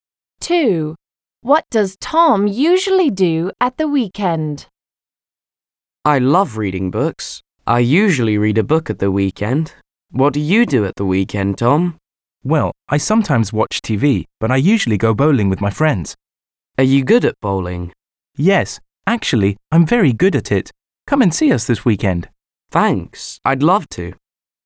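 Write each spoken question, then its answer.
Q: What does Tom usually do at the weekend?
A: goes bowling with his friends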